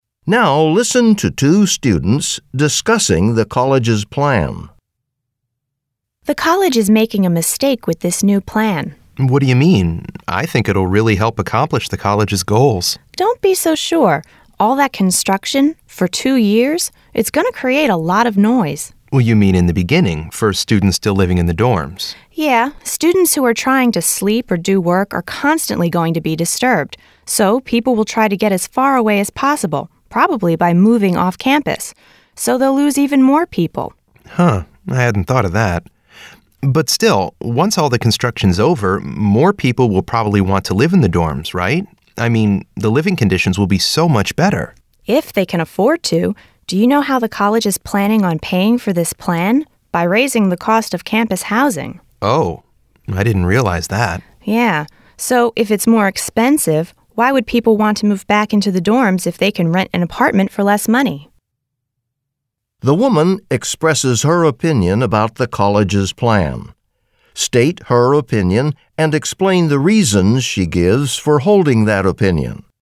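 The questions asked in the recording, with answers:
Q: The woman expresses her opinion about the college's plan. State her opinion and explain the reasons she gives for holding that opinion.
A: She thinks the plan is a mistake: two years of construction noise will disturb students and push them off campus, and the plan is paid for by raising housing costs, so students won't come back when cheaper apartments are available.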